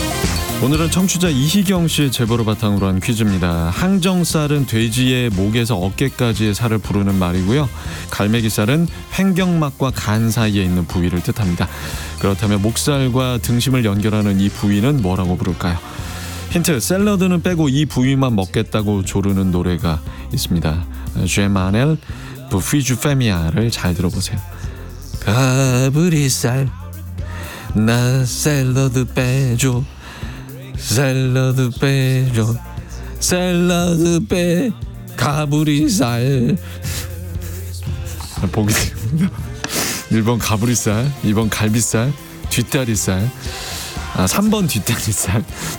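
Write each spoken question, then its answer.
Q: 그렇다면 목살과 등심을 연결하는 이 부위는 뭐라고 부를까요?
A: 1: 가브리살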